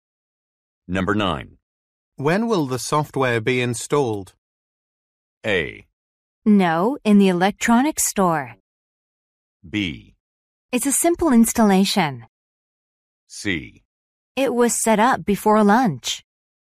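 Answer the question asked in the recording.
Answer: C: It was set up before lunch.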